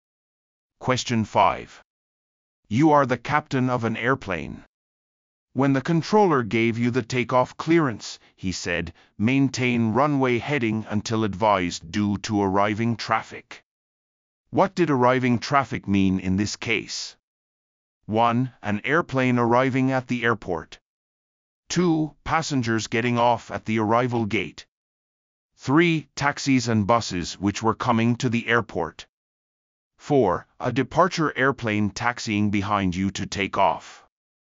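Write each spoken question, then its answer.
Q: What did arriving traffic mean in this case?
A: 1: An airplane arriving at the airport.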